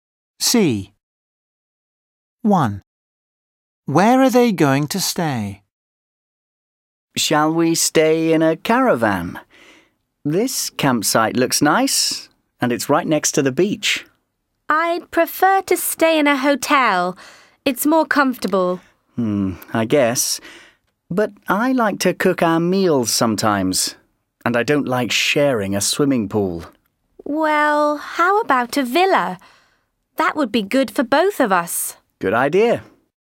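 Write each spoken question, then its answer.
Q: Where are they going to stay?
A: in a villa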